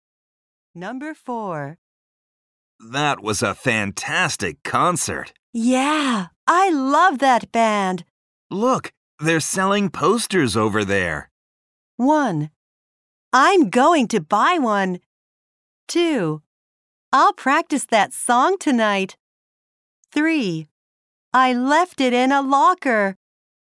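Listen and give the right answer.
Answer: 1: I'm going to buy one.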